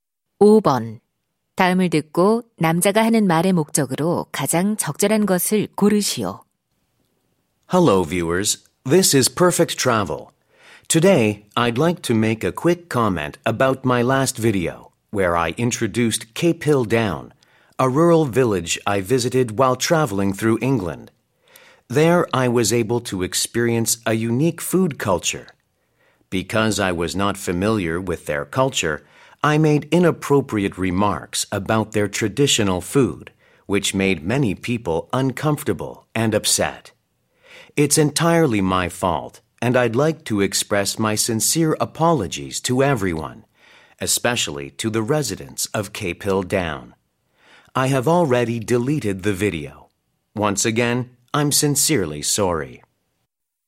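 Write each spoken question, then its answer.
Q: 다음을 듣고 남자가 하는 말의 목적으로 가장 적절한 것을 고르시오.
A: 지난 영상의 부적절한 발언에 대해 사과하려고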